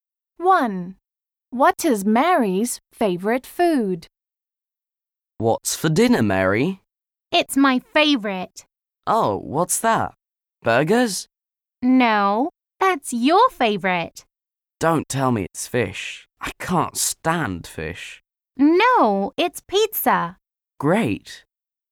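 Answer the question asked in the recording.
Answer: pizza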